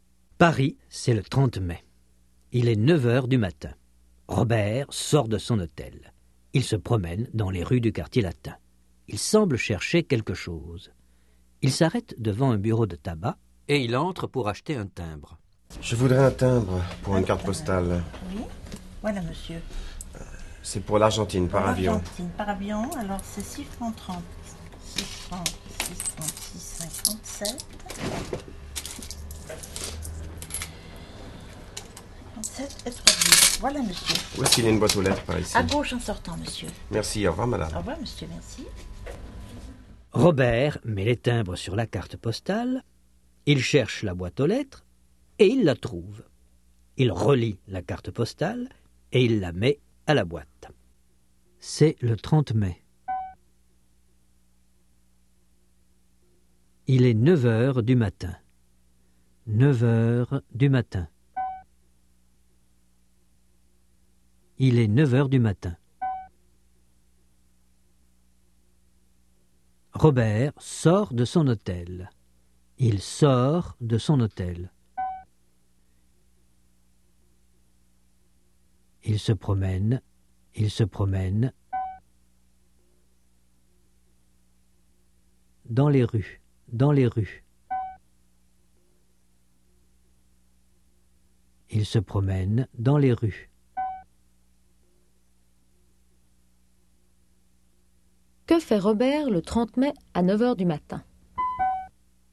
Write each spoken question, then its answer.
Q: Que fait Robert le 30 mai à 9h du matin?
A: Il sort de son hôtel.